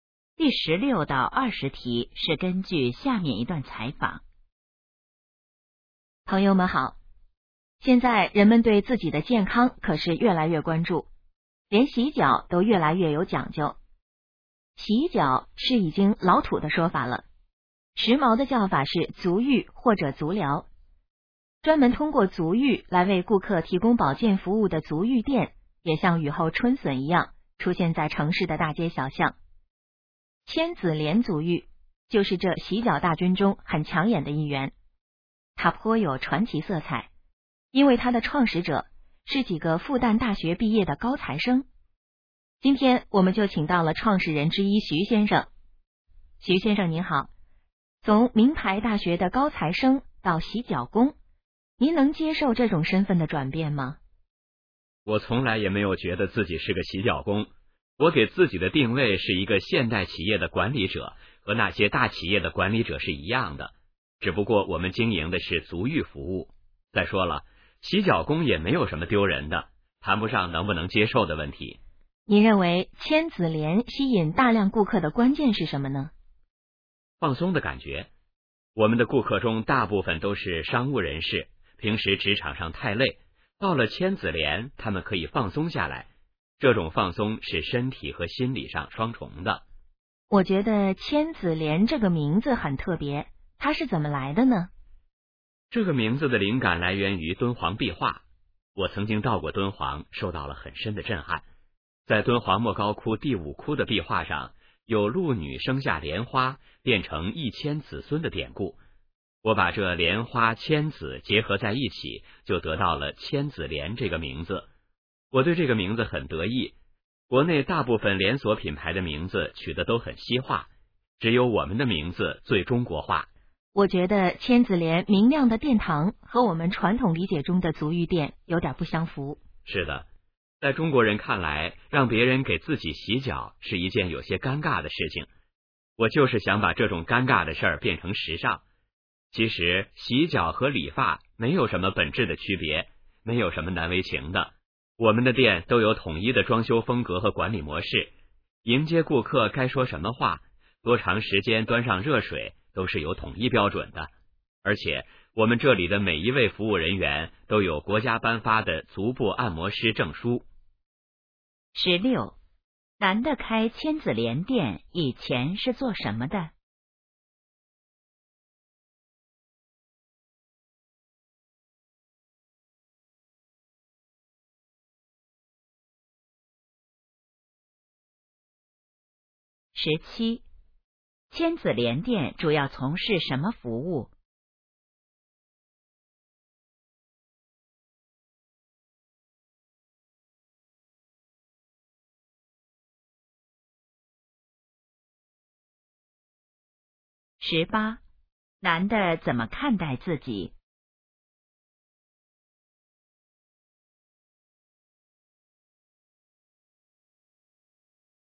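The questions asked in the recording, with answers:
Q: 男的开千子莲店以前是做什么的?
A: 复旦大学毕业的高材生(学生)

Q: 千子莲店主要从事什么服务?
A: 足浴服务

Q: 男的怎么看待自己?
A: 现代企业的管理者

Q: 千子莲这个名字来自什么?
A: 敦煌壁画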